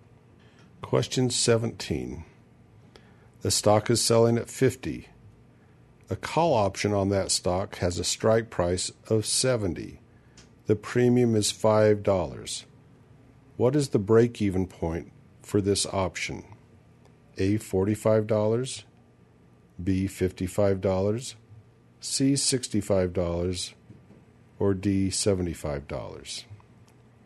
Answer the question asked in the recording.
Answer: And the answer is D, $75.